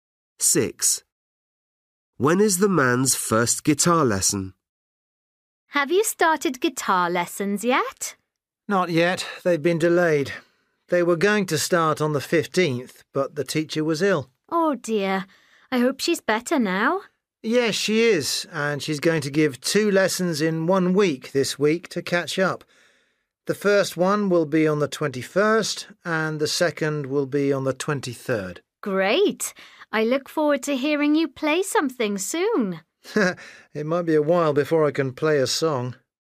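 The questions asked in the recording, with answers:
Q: When is the man's first guitar lesson?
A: on the 21st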